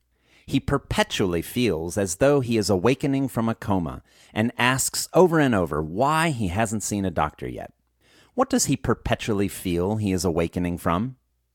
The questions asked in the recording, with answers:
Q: What does he perpetually feel he is awakening from?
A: He perpetually feels like he is awakening from a coma.